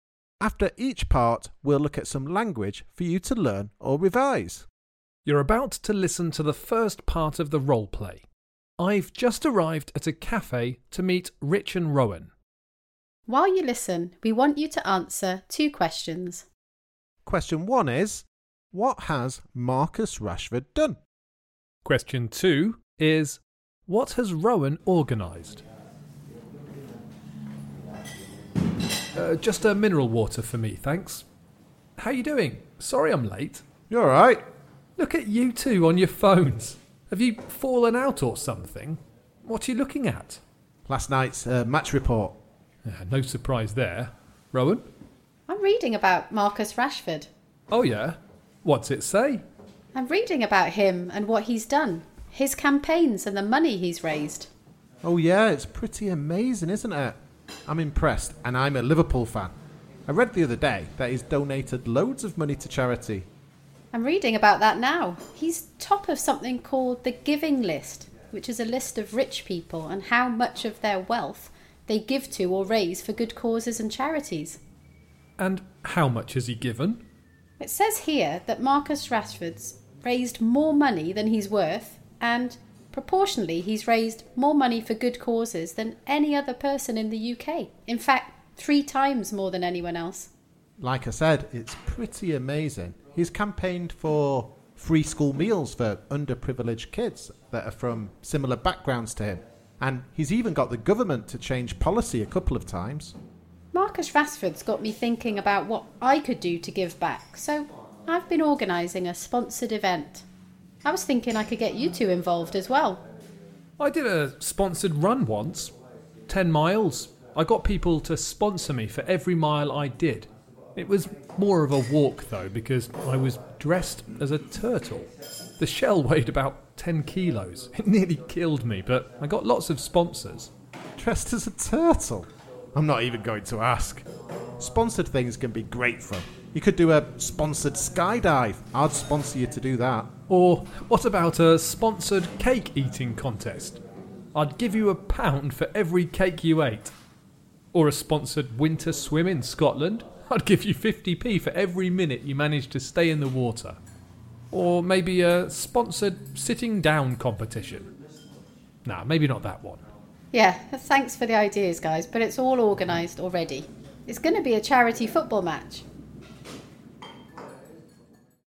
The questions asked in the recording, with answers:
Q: what has Marcus Rashford done?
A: he's raised lots of money for good causes or charity and campaigned for free school meals for underprivileged children.